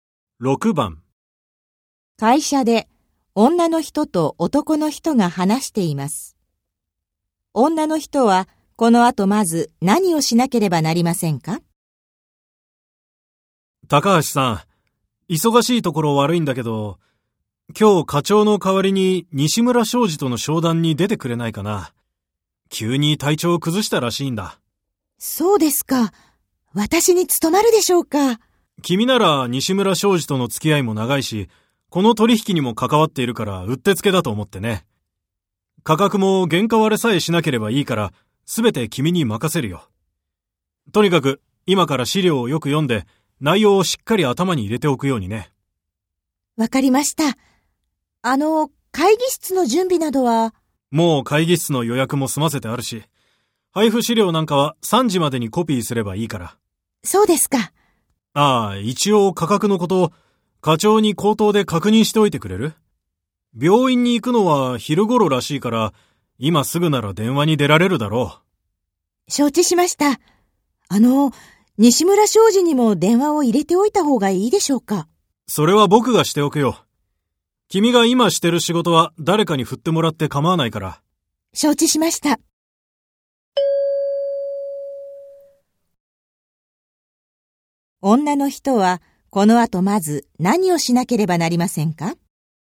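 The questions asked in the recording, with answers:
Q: 女の人はこの後まず何をしなければなりませんか?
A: 課長に電話して価格のことを確認する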